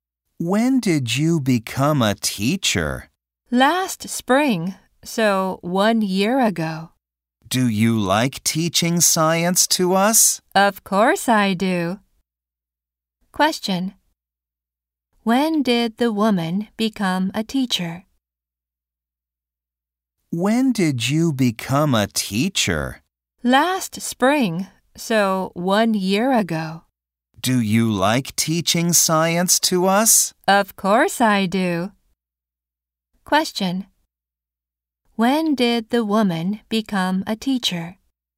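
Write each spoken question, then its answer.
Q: When did the woman become a teacher?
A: Last spring, one year ago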